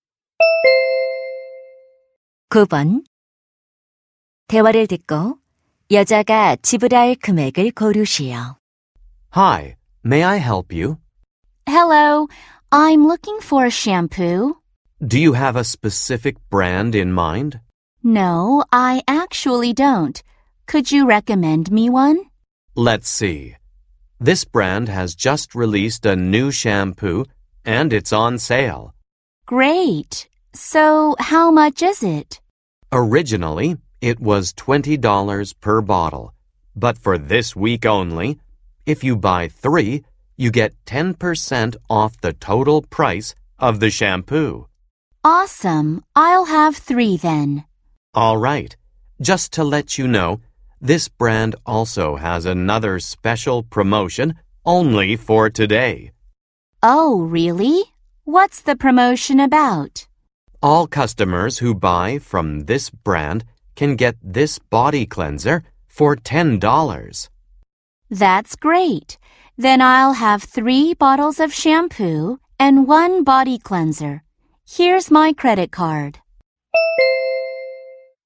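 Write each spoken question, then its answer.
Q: 대화를 듣고 여자가 지불할 금액을 고르시오.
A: $64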